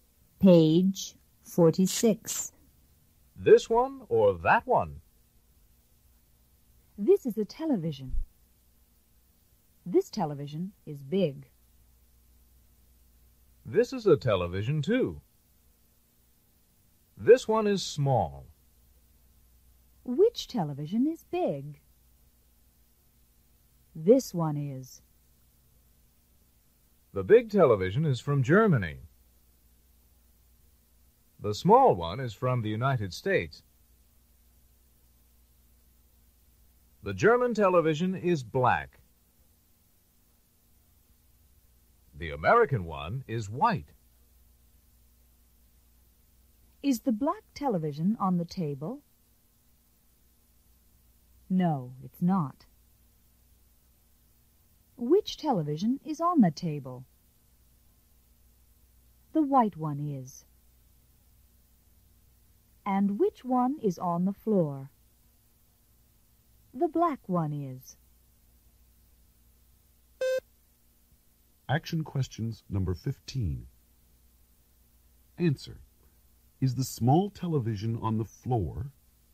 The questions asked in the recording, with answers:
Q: Is the small television on the floor?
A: No, it's not.